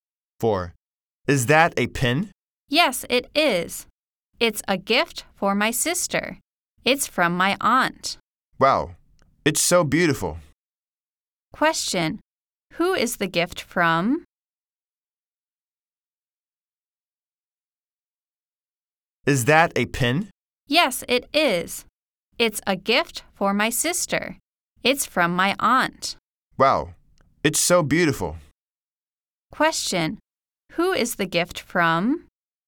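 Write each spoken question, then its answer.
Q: who is the gift from?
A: Her aunt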